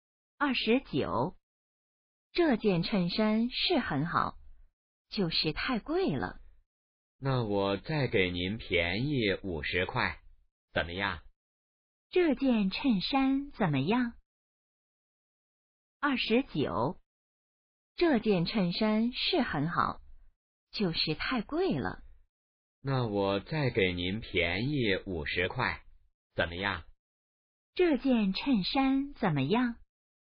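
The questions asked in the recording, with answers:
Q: 这件衬衫怎么样?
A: 很好,但是太贵了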